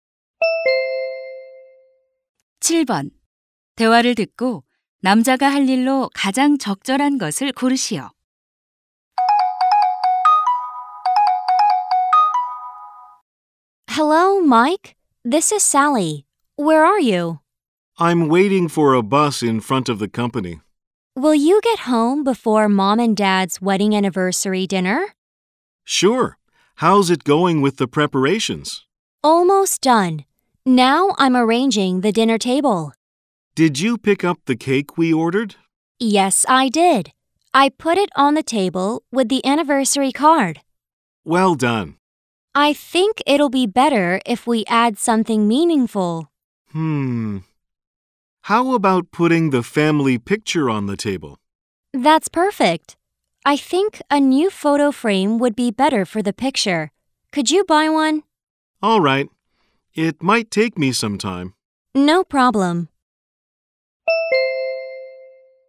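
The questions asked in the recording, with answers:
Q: 대화를 듣고 남자가 할 일로 가장 적절한 것을 고르시오.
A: 새 액자 사기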